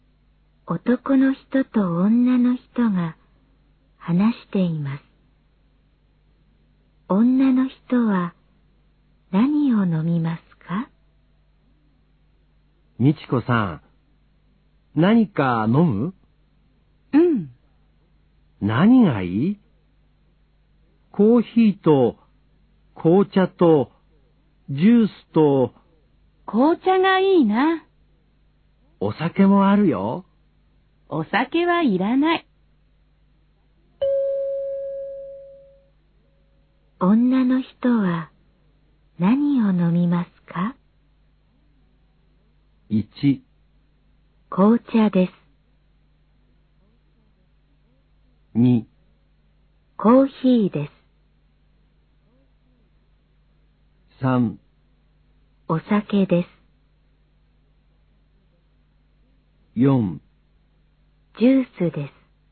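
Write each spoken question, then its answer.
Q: 女の人は何を飲みますか?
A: 1: 紅茶です。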